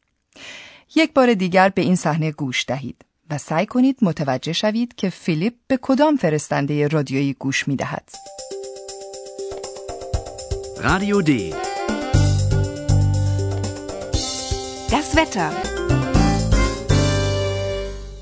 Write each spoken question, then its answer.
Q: یک بار دیگر به این صحنه گوش دهید و سعی کنید متوجه شوید که فیلیپ به کدام فرستنده رادیویی گوش می دهد.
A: این فرستنده رادیویی همان رادیو دی است.